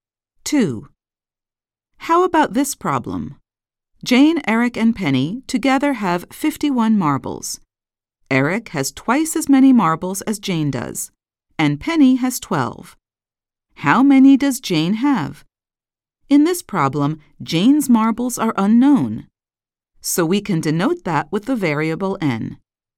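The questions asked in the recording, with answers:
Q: How many does Jane have?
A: 13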